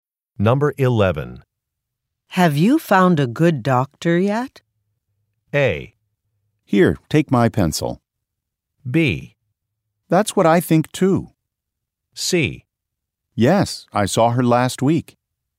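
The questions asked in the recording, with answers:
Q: Have you found a good doctor yet?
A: C: Yes, I saw her last week.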